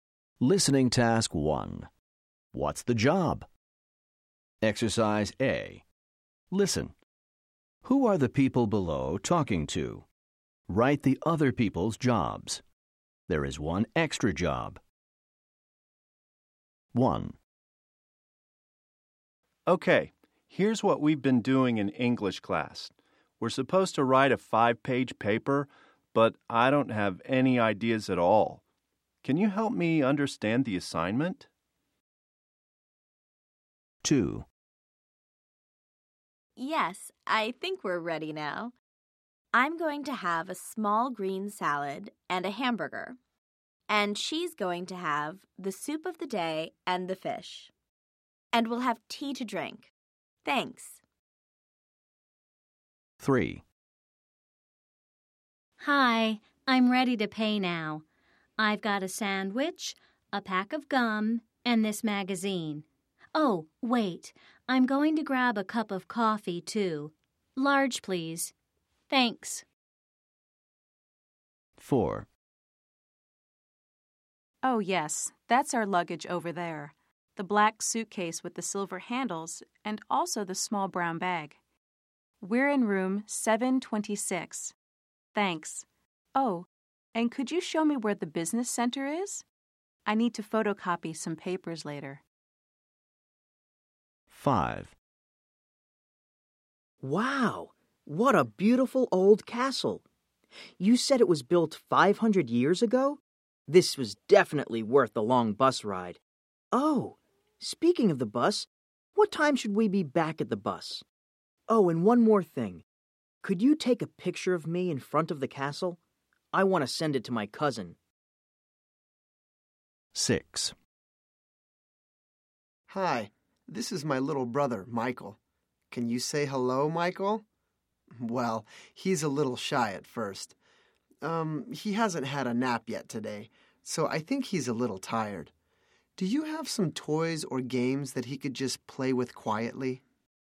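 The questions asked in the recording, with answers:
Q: Who are the people below talking to?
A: a waiter/server

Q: Who are the people below talking to?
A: a cashier

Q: Who are the people below talking to?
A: a tour guide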